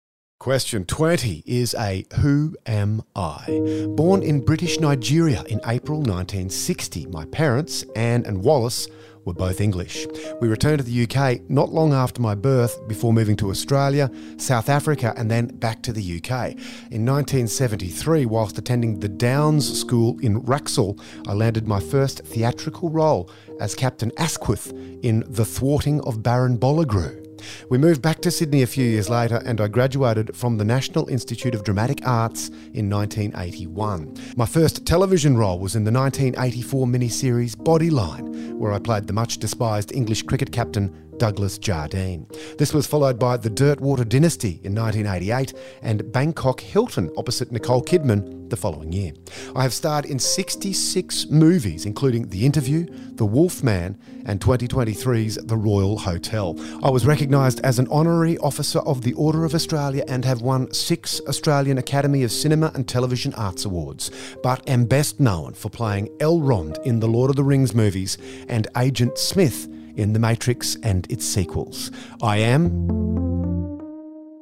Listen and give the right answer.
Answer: I am Hugo Weaving.